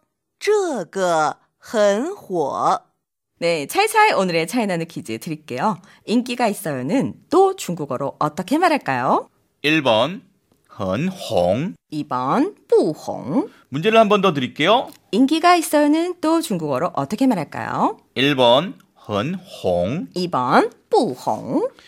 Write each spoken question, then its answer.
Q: 인기가 있어요는 또 중국어로 어떻게 말할까요?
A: 정답은 1번 헌홍.